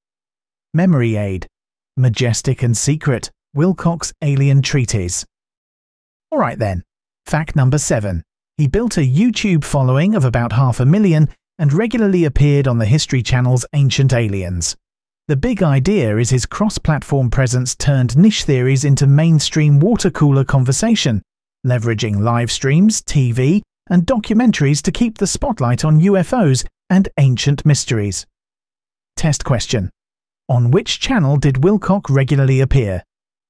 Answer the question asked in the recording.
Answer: Correct answer, the History Channel.